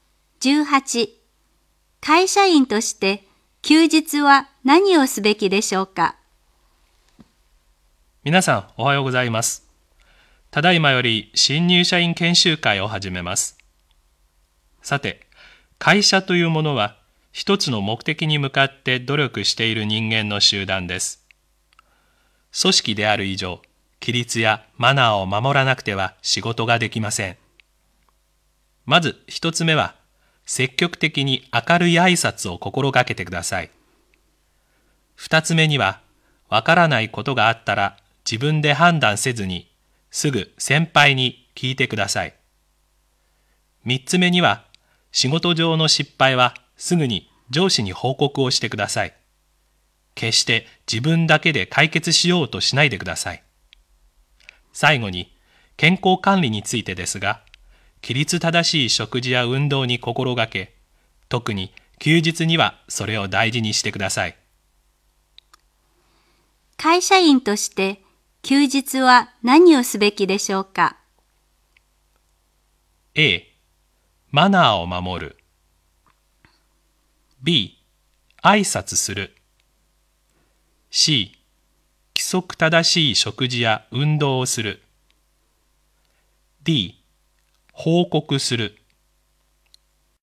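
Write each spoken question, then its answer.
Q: 会社員として休日は何をすべきでしょうか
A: C: 規則正しい食事や運動をする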